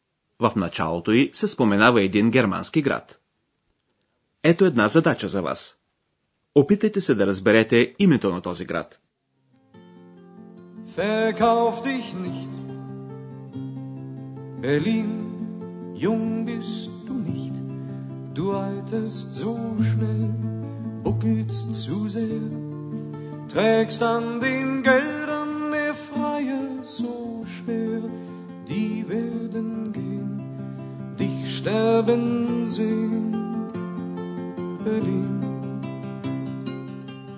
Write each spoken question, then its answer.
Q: Опитайте се да разберете името на този град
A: Берлин. Берлин.